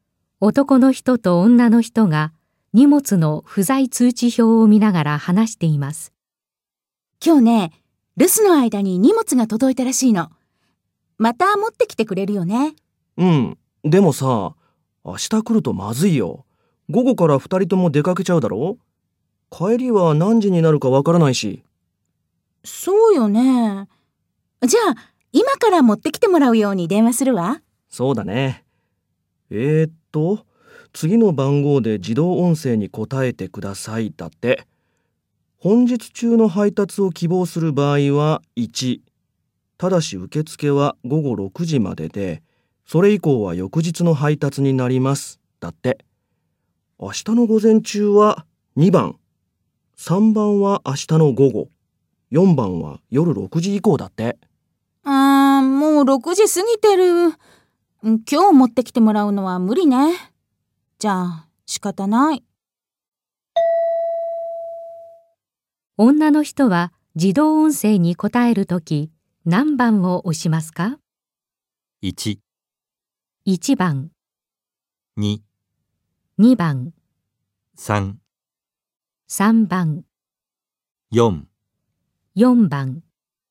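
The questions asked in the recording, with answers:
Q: 女の人は自動音声に答えるとき何番を押しますか?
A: 2番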